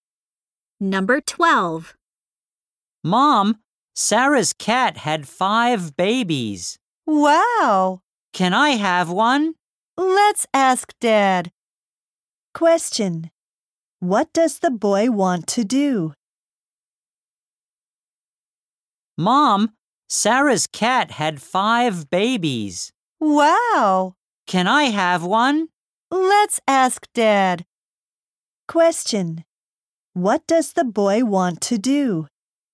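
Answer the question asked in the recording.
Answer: Have one of the cat's babies (a kitten)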